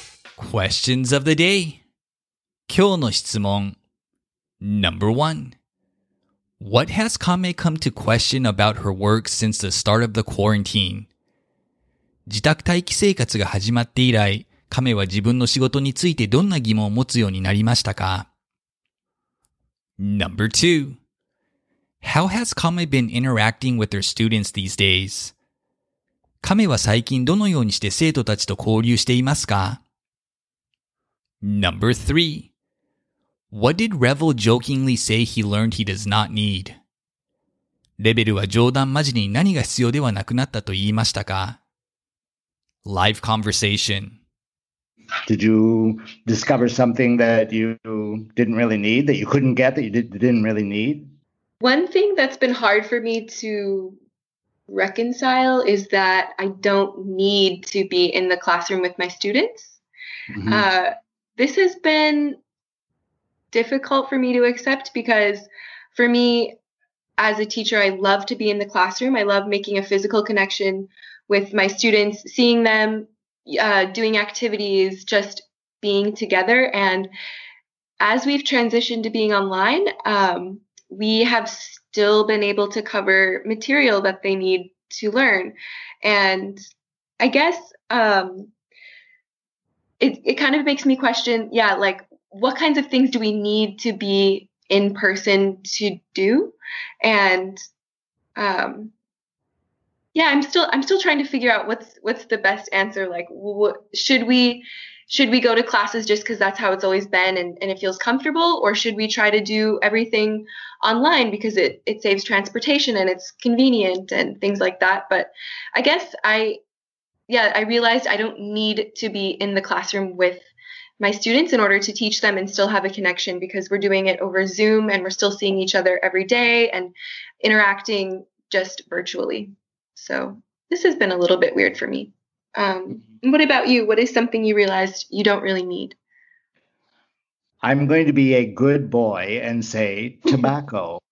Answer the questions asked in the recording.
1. She has come to question what things she has to or should do in person versus what things she should or can do virtually.
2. She has been using Zoom to interact with her students.
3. He jokingly said he does not need tobacco.